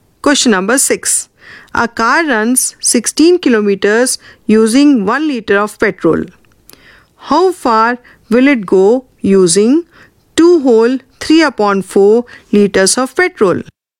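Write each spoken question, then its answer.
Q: How far will it go using 2 whole 3 upon 4 liters of petrol?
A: 44 kilometers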